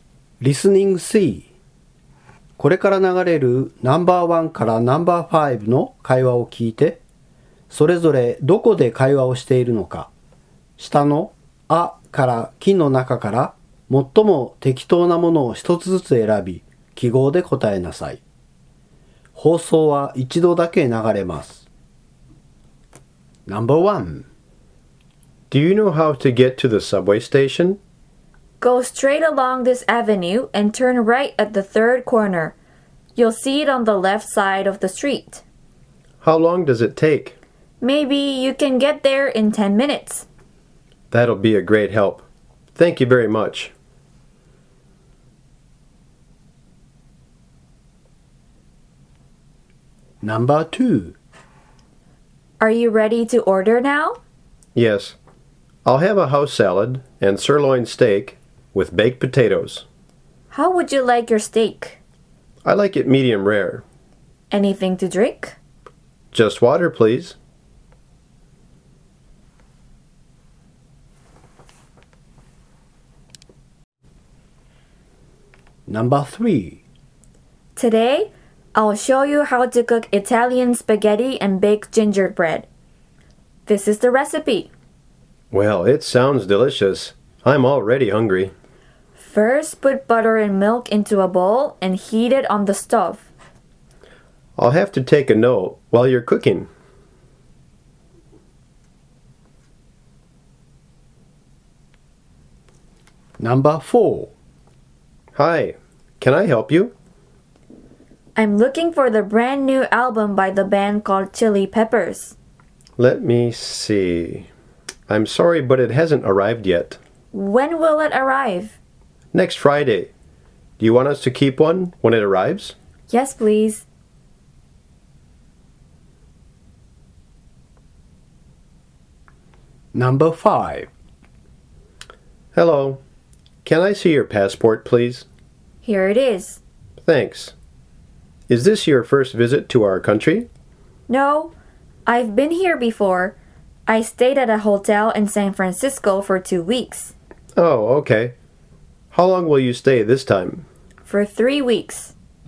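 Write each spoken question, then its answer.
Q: それぞれどこで会話をしているのか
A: 路上(道案内)

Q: それぞれどこで会話をしているのか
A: レストラン

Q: それぞれどこで会話をしているのか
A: CDショップ

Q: それぞれどこで会話をしているのか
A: 空港(入国審査)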